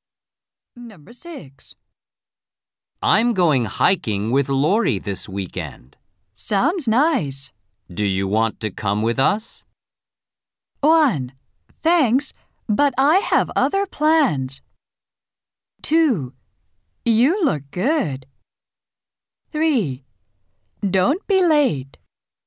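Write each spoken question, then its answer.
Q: Do you want to come with us?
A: 1: Thanks, but I have other plans.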